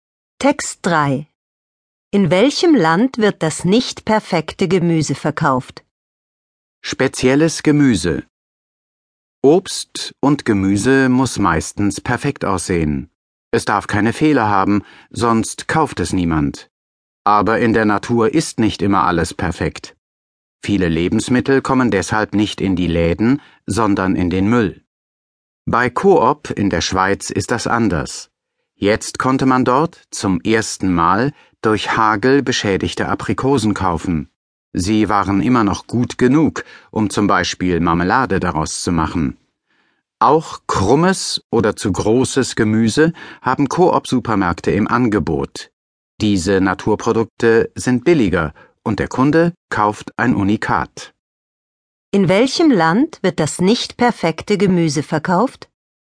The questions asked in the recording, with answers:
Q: In welchem Land wird das nicht perfekte Gemüse verkauft?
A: In der Schweiz.